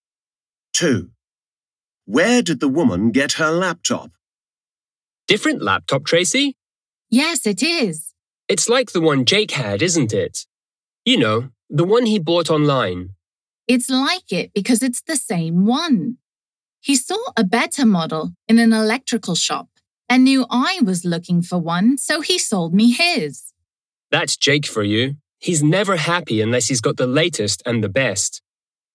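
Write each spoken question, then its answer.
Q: Where did the woman get her laptop?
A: From Jake, a friend who sold her his old one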